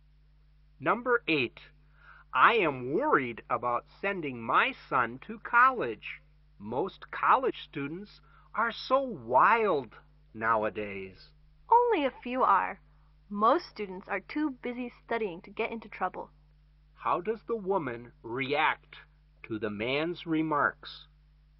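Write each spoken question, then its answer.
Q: How does the woman react to the man's remarks?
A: She disagrees and says most students are busy studying.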